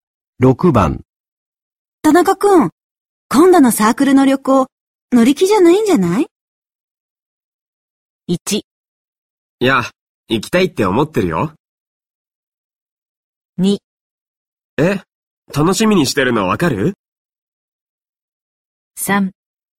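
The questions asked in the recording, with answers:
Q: 田中くん、今度のサークルの旅行、乗り気じゃないんじゃない?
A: 1: いや、行きたいって思ってるよ。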